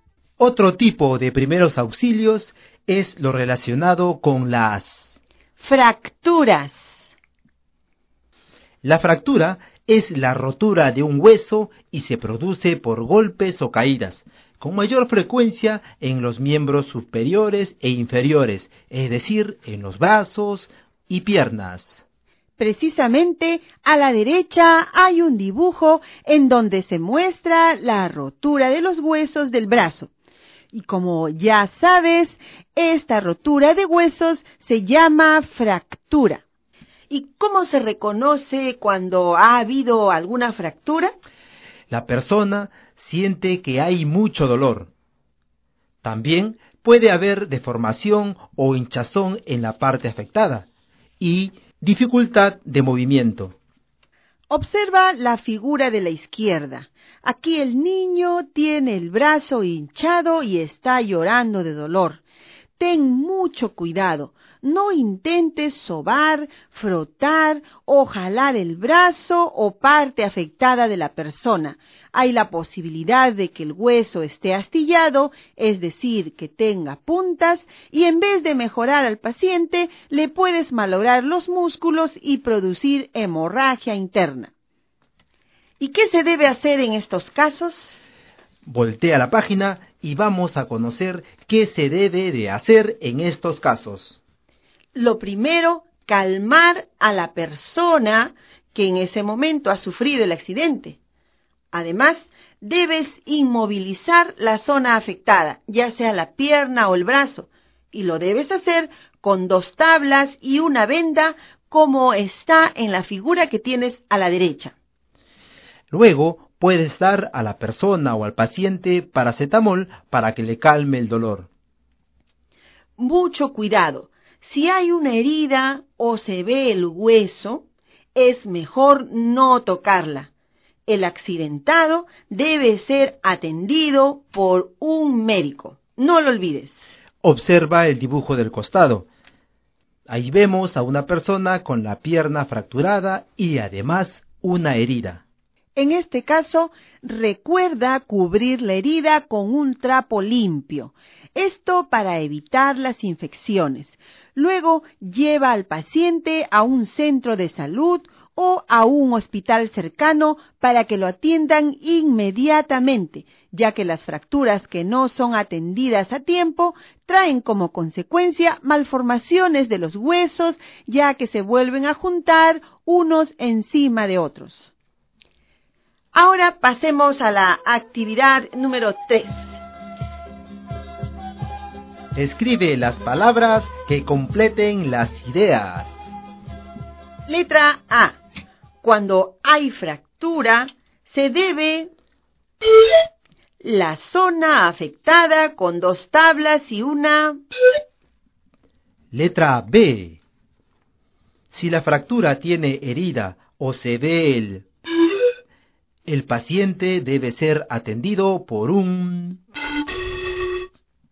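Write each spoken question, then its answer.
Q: Letra A. Cuando hay fractura, se debe la zona afectada con dos tablas y una...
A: inmovilizar; venda

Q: Letra B. Si la fractura tiene herida o se ve el...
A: hueso

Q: El paciente debe ser atendido por un...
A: médico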